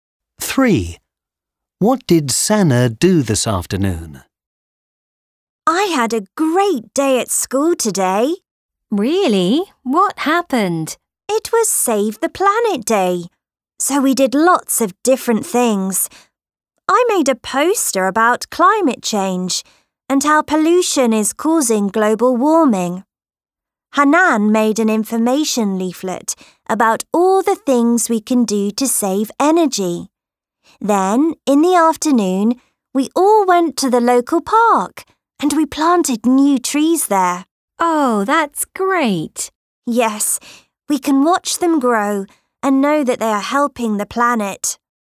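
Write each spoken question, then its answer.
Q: What did Sana do this afternoon?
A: Planted new trees in the local park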